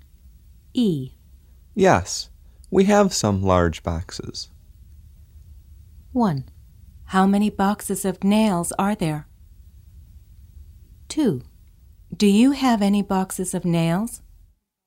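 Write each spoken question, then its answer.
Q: Yes, we have some large boxes.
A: 2: Do you have any boxes of nails?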